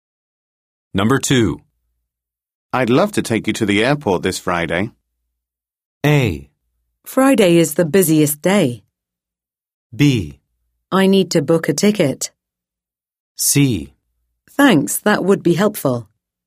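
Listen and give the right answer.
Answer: C: Thanks, that would be helpful.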